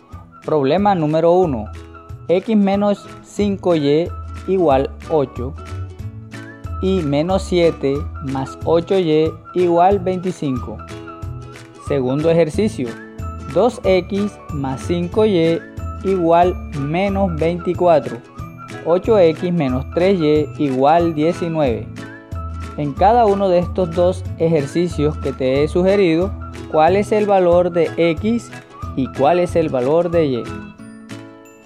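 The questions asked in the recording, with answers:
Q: ¿cuál es el valor de X y cuál es el valor de Y?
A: x = 1/2, y = -5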